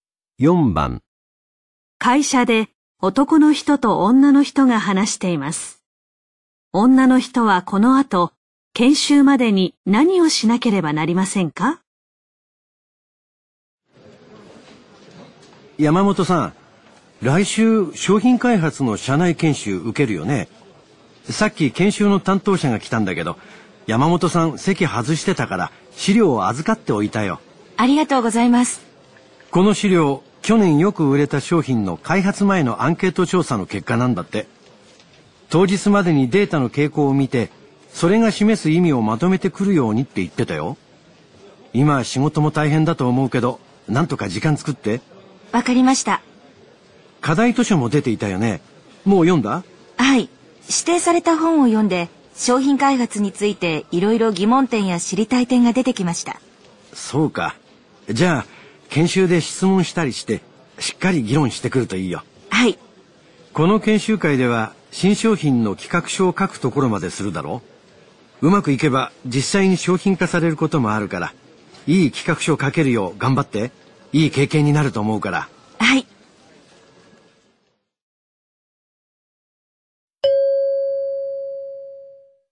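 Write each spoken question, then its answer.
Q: 女の人はこの後、研修までに何をしなければなりませんか?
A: アンケート結果のデータの傾向とその意味をまとめる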